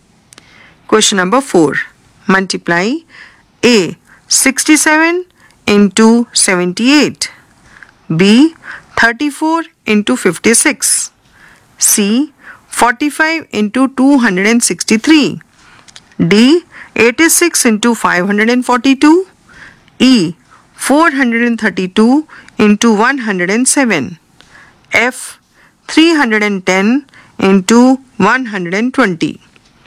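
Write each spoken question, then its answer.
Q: 67 into 78.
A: 5226

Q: 34 into 56.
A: 1904

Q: 45 into 263.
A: 11835

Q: 86 into 542.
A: 46612

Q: 432 into 107.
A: 46224

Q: 310 into 120.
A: 37200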